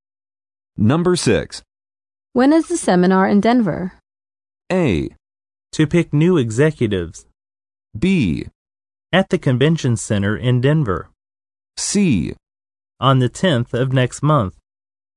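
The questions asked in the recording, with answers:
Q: When is the seminar in Denver?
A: C: On the 10th of next month.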